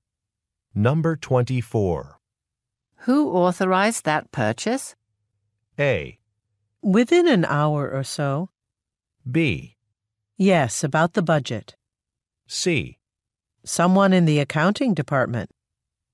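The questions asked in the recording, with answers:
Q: Who authorized that purchase?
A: C: Someone in the accounting department.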